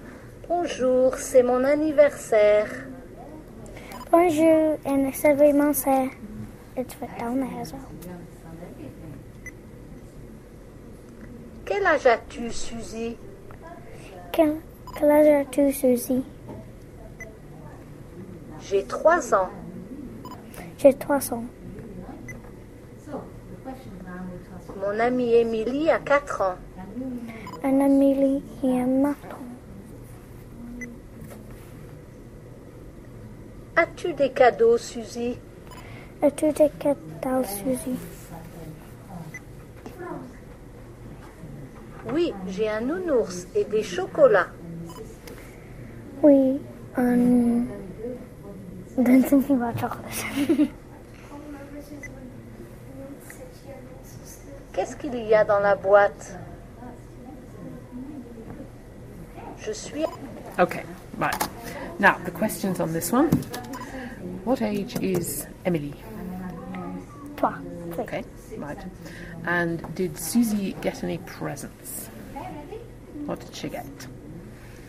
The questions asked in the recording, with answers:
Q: What did she get?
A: Well, she got chocolate, didn't she?